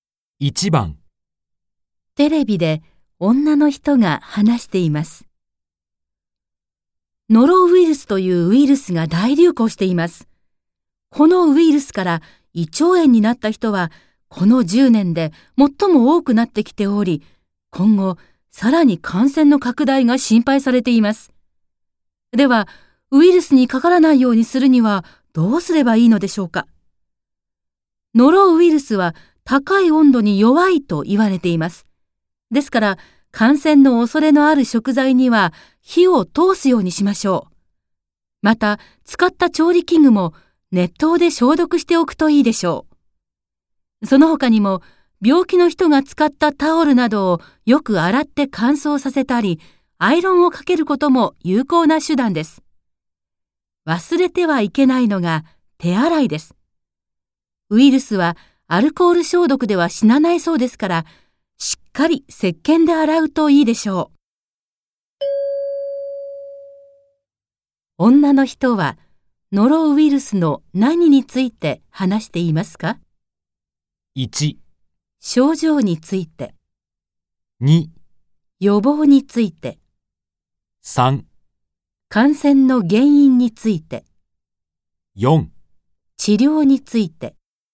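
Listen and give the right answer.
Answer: 2: 予防について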